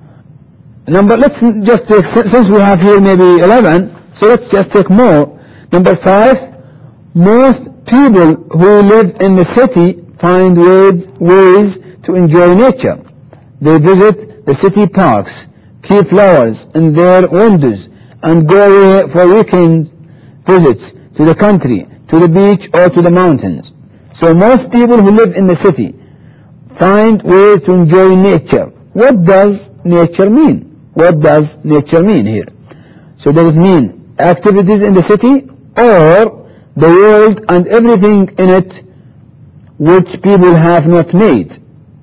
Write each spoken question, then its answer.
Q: So does it mean activities in the city, or the world and everything in it which people have not made?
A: I think the second one. So nature means the world and everything in it which people have not made.